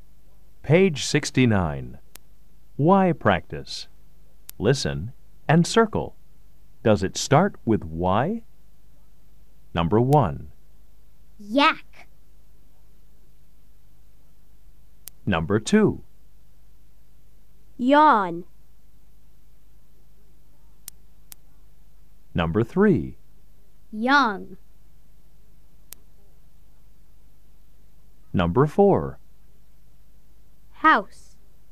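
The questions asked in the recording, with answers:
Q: Does it start with Y?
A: Yes (yak)

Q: Does it start with Y?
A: Yes (yawn)

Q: Does it start with Y?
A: Yes (young)

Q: Does it start with Y?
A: No (house)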